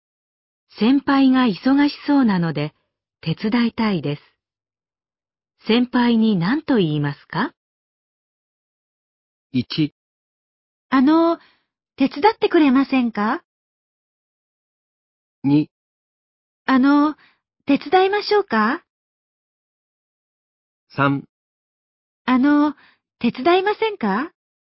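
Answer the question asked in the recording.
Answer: 2: 手伝いましょうか?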